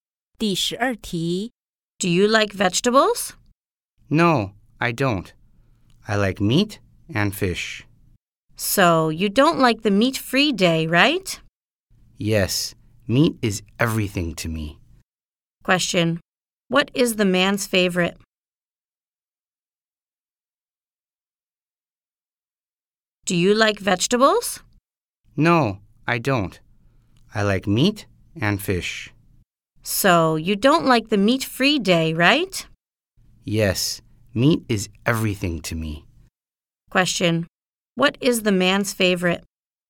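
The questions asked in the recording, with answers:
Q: what is the man's favorite?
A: Meat (and fish)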